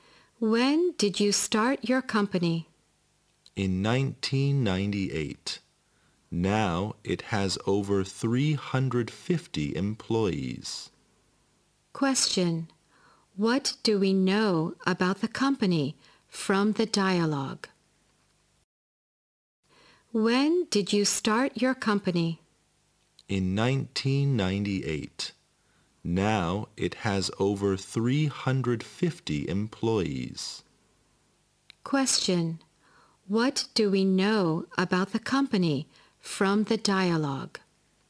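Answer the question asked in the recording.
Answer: It started in 1998 and now has over 350 employees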